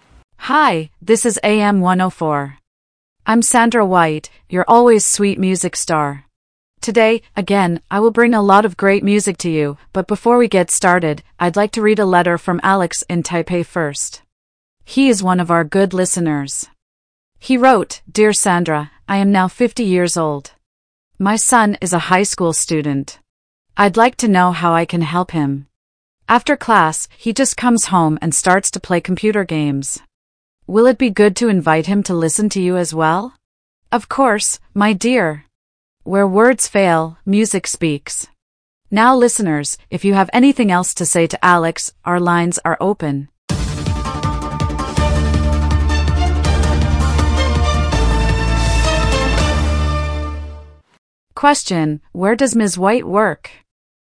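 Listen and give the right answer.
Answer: At a radio station (AM104)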